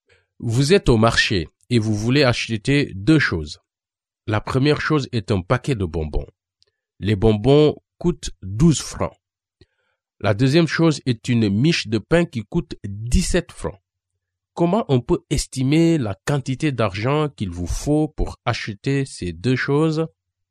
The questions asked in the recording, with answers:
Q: Comment on peut estimer la quantité d'argent qu'il vous faut pour acheter ces deux choses?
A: La réponse est 30 francs.